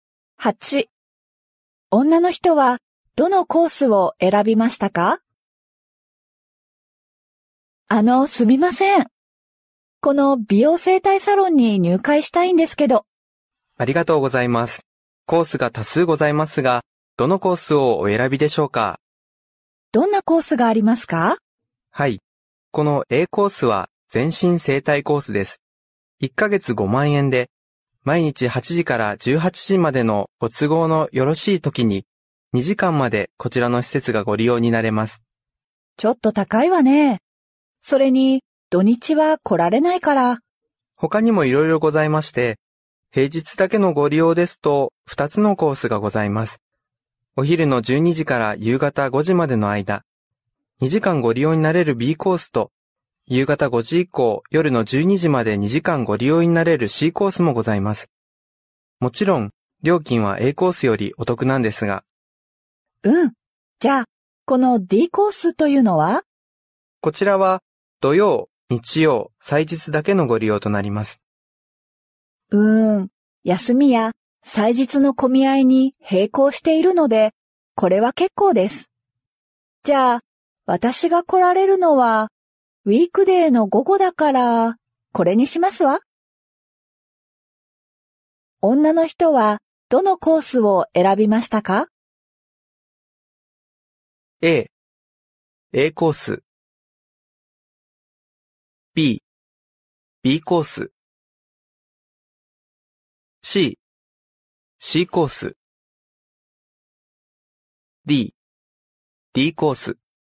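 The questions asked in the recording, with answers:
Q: 女の人は、どのコースを選びましたか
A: B: B コース。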